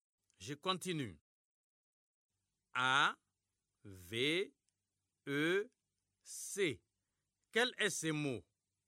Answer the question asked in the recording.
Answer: J'espère que vous avez trouvé avec.